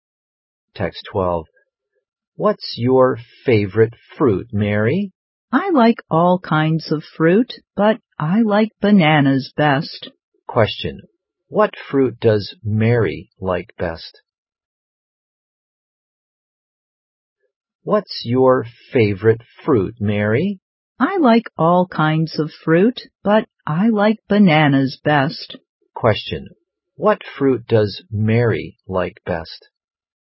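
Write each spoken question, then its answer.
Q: What fruit does Mary like best?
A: Bananas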